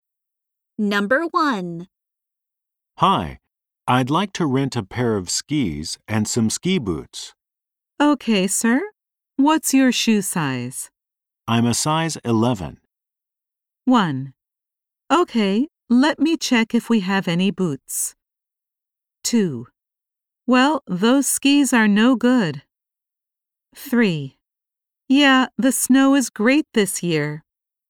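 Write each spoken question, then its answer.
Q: I'm a size 11.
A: 1: Okay, let me check if we have any boots.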